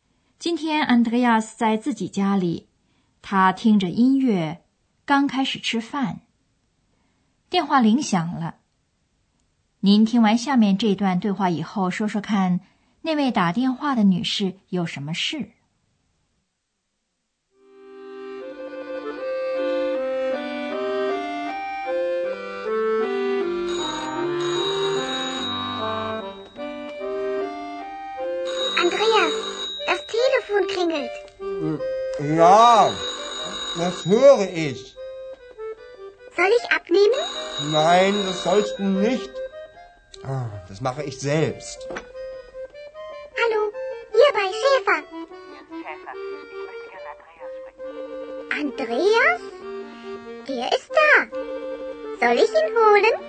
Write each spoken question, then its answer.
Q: 您听完下面这段对话以后,说说看,那位打电话的女士有什么事?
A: 那位打电话的女士想和 Andreas 说话。